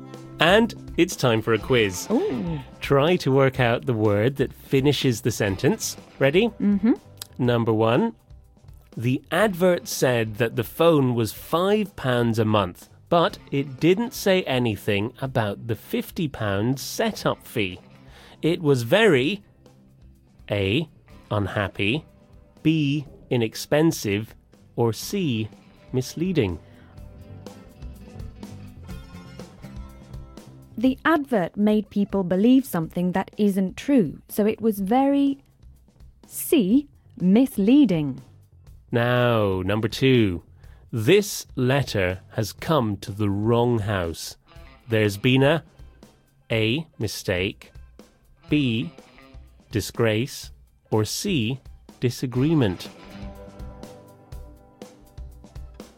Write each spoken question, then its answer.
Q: The advert said that the phone was £5 a month, but it didn't say anything about the £50 setup fee. It was very A. unhappy, B. inexpensive, or C. misleading.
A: The advert made people believe something that isn't true, so it was very C. misleading.